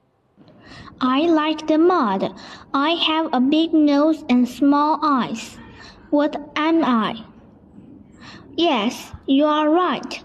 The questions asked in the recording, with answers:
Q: I like the mud. I have a big nose and small eyes. What am I?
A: I am a pig.